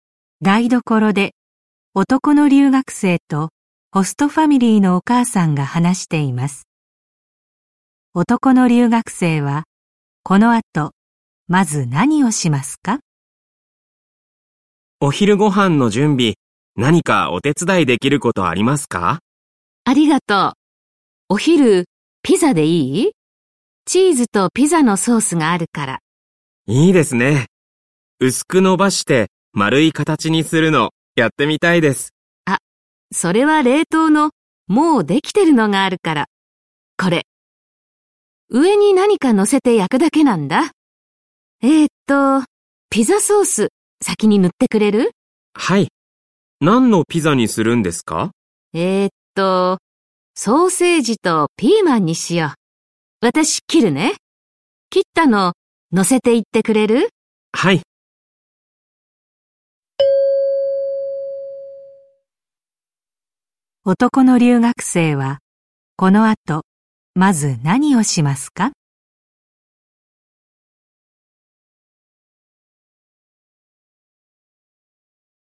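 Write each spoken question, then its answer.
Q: 男の留学生はこの後まず何をしますか?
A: ピザソースを塗る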